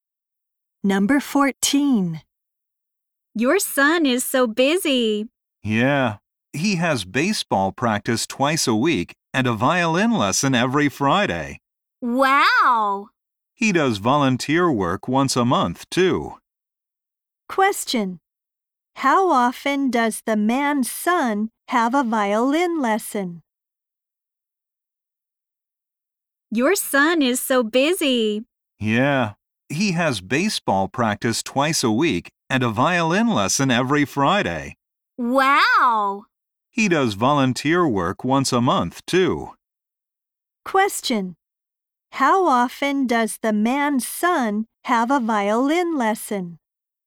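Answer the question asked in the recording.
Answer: Once a week (every Friday)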